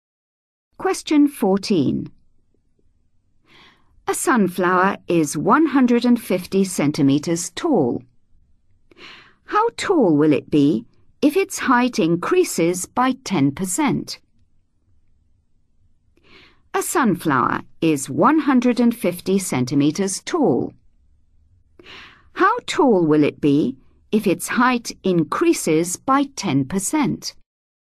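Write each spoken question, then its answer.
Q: How tall will it be if its height increases by 10%?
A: 165 cm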